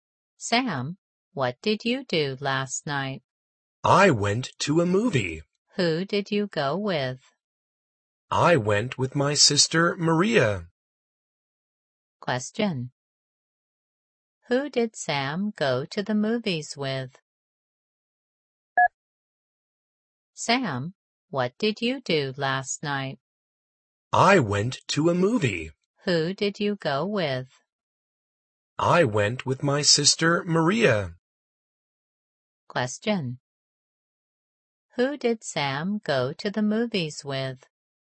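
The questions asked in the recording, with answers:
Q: Who did Sam go to the movies with?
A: His sister Maria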